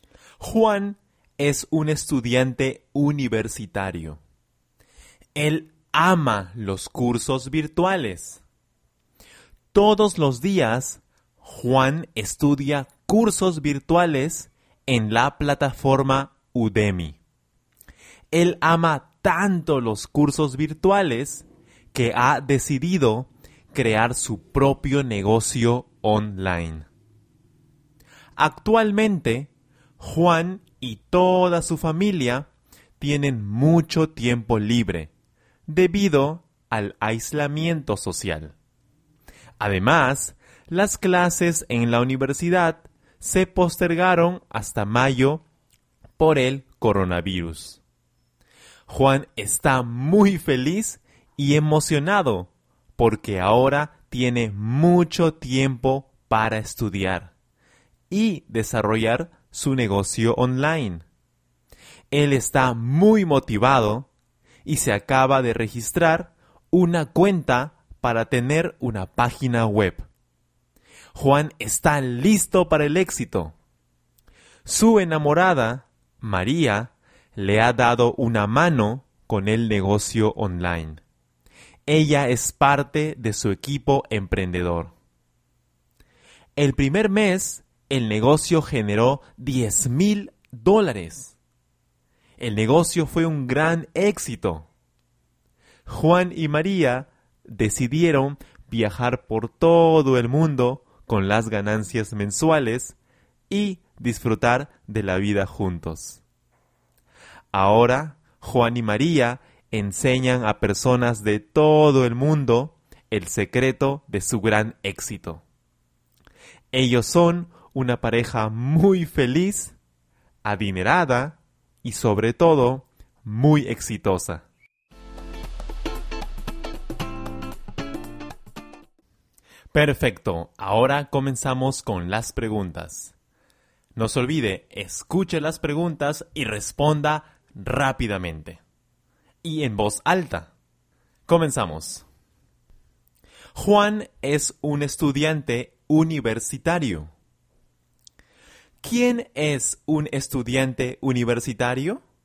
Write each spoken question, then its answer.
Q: ¿Quién es un estudiante universitario?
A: Juan. Juan es un estudiante universitario.